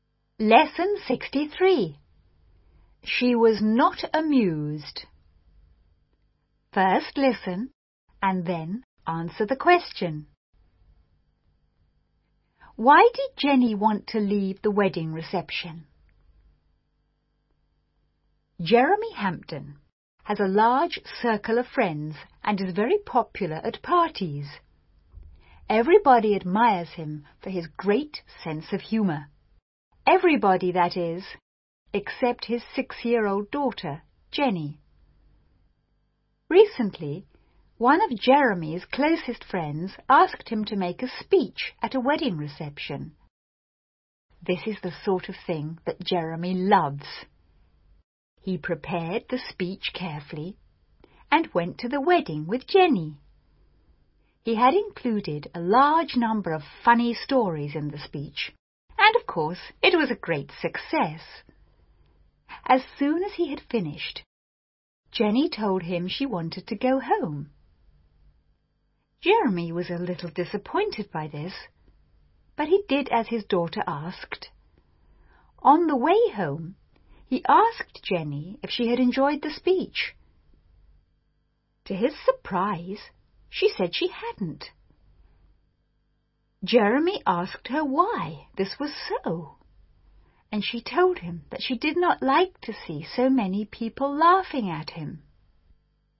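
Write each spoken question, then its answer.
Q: Why did Jenny want to leave the wedding reception?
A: She did not like to see so many people laughing at her father.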